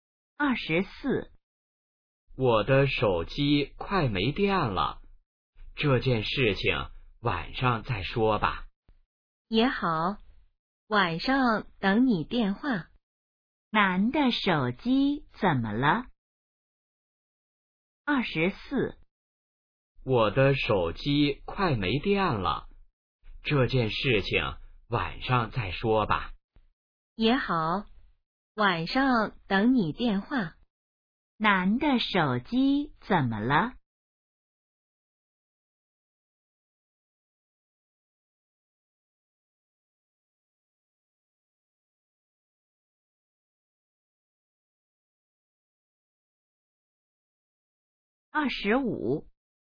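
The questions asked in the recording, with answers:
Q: 男的手机怎么了?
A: 快没电了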